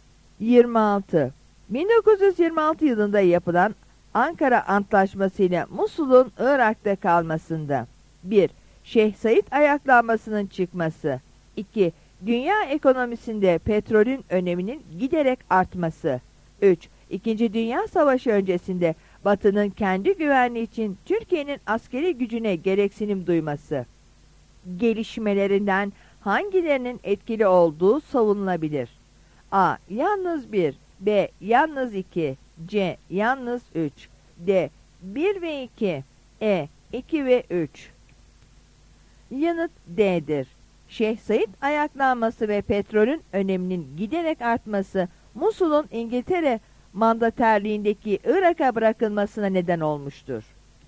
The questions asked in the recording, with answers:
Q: Gelişmelerinden hangilerinin etkili olduğu savunulabilir?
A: Yanıt D'dir.